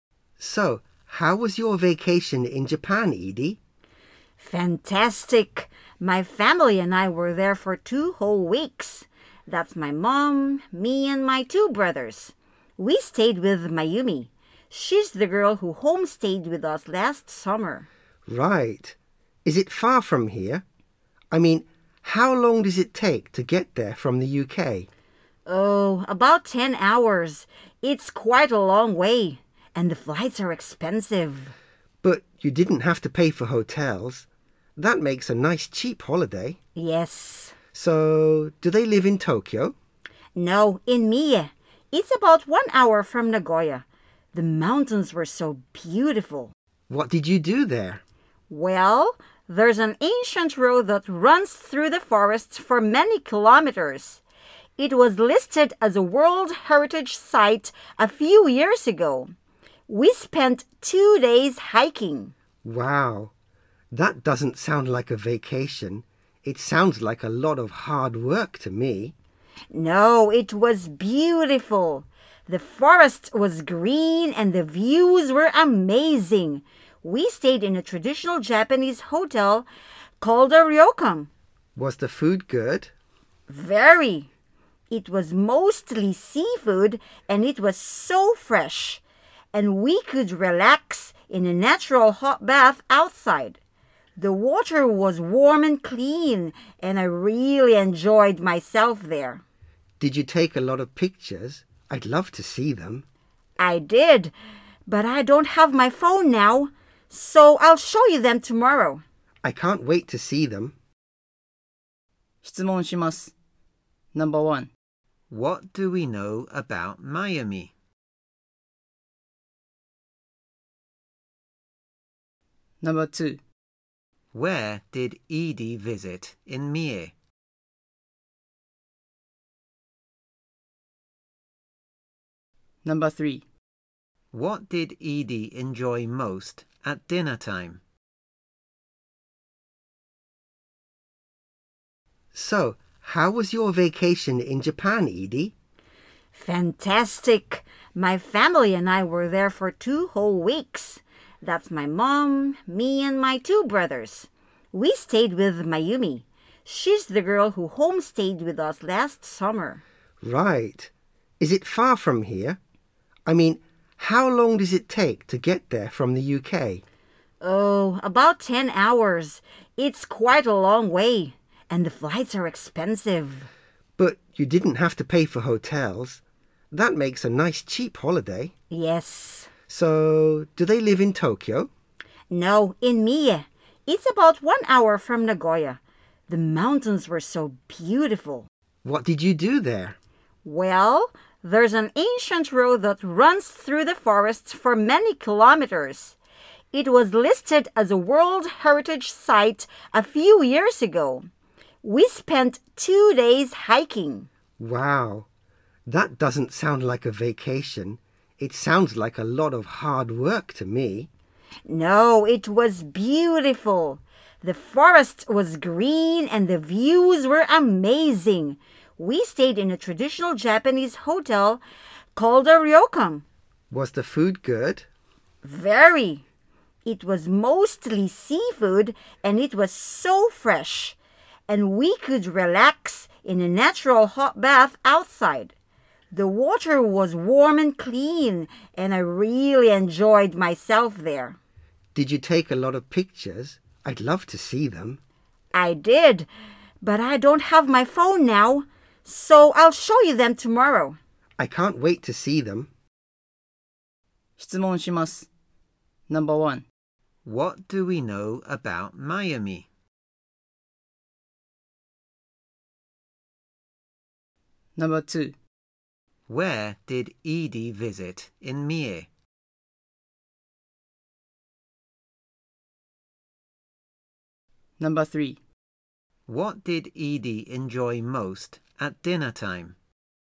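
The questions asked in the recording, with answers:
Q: What do we know about Mayumi?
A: She homestayed with Edie's family last summer

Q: Where did Edie visit in Mie?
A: An ancient road through the forest (a World Heritage Site)

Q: What did Edie enjoy most at dinner time?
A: The fresh seafood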